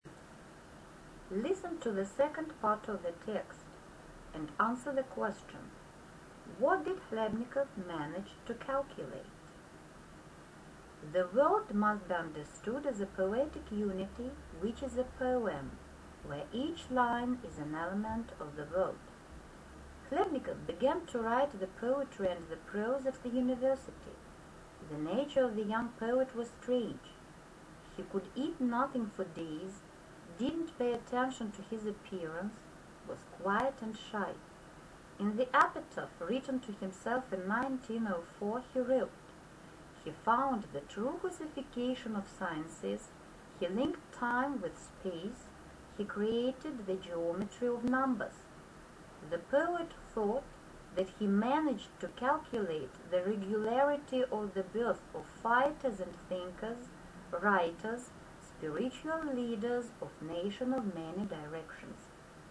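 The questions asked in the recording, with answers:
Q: What did Хлебников manage to calculate?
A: The regularity of the birth of fighters and thinkers, writers, spiritual leaders of nations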